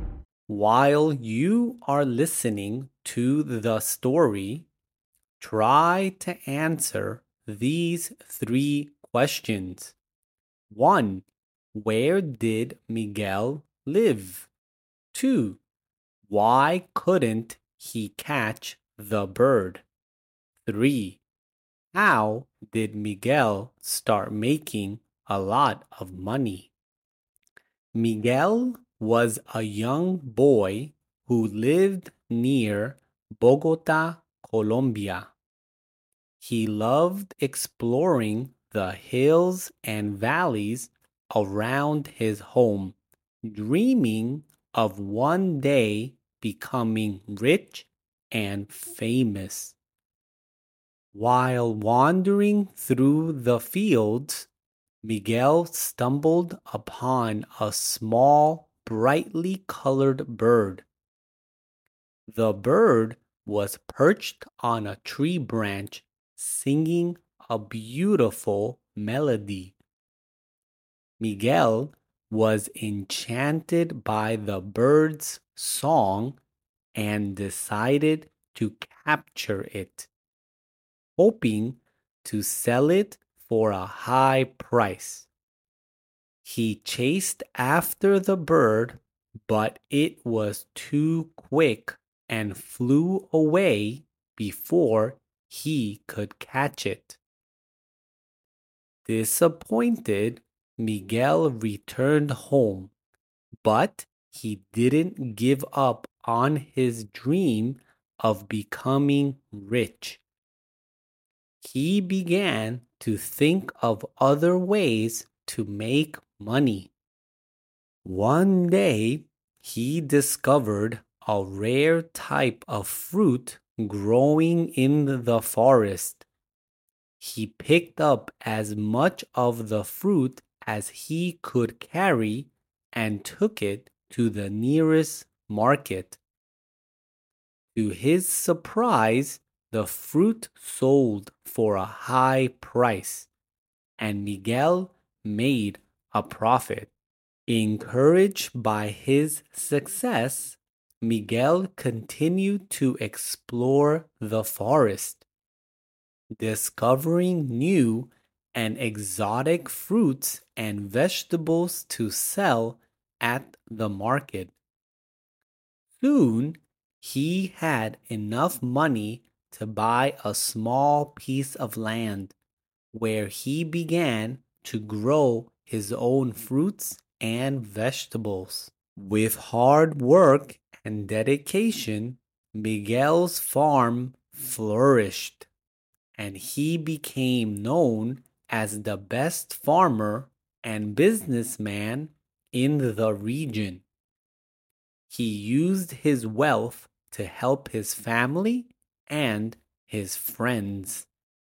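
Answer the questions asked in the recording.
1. Near Bogota, Colombia
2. It was too quick and flew away
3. By selling a rare fruit he found in the forest at the market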